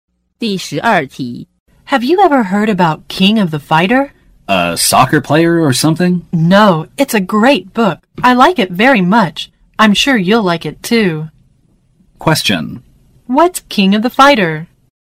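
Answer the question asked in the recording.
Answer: A book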